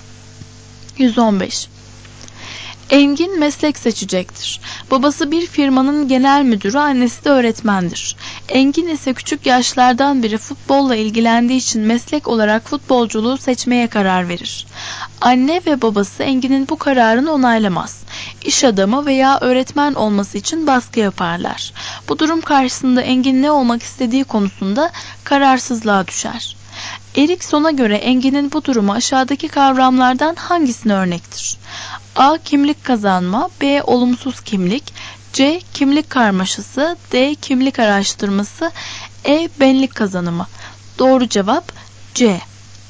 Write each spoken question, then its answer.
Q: Erikson'a göre Engin'in bu durumu aşağıdaki kavramlardan hangisine örnektir?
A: Doğru cevap C.